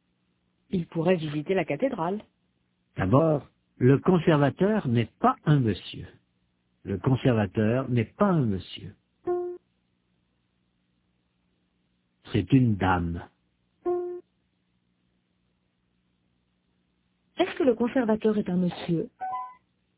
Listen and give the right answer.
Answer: Non, c'est une dame.